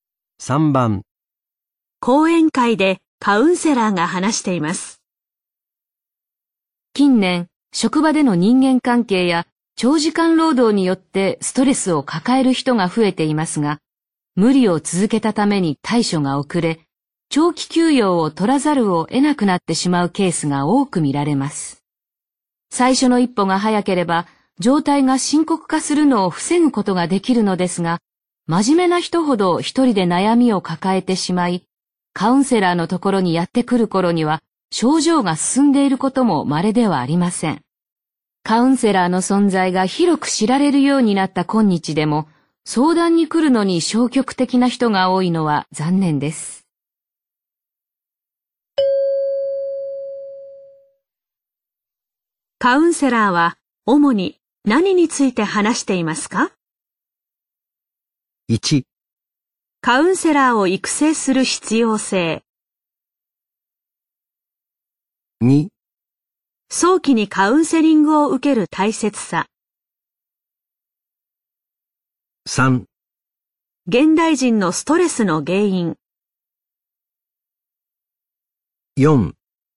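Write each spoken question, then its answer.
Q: に何について話していますか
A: 2: 早期にカウンセリングを受ける大切さ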